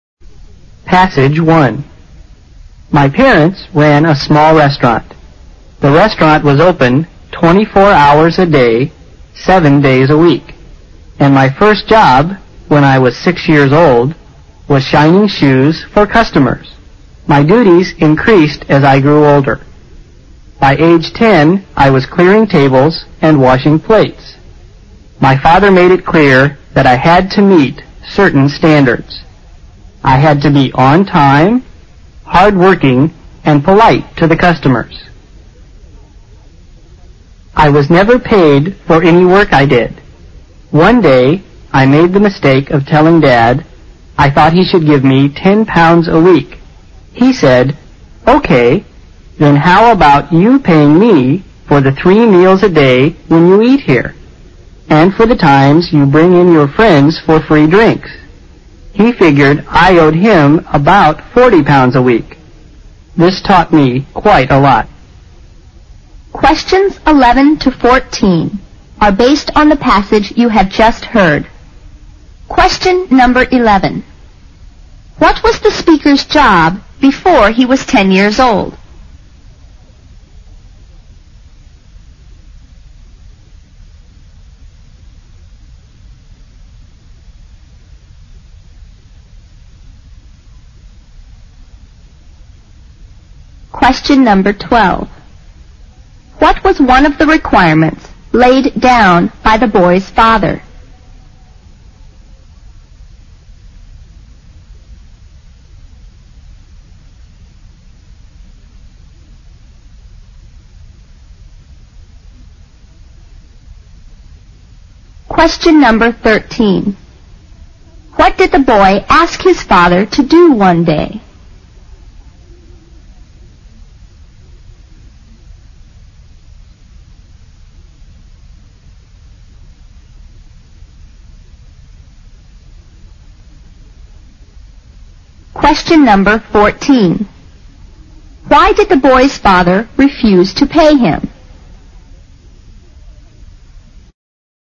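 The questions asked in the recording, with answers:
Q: What was the speaker's job before he was 10 years old?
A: Shining shoes for customers

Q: What was one of the requirements laid down by the boy's father?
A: To be on time, hardworking and polite to customers

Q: What did the boy ask his father to do one day?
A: Pay him £10 a week

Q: Why did the boy's father refuse to pay him?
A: The boy owed him about £40 a week for meals and his friends' free drinks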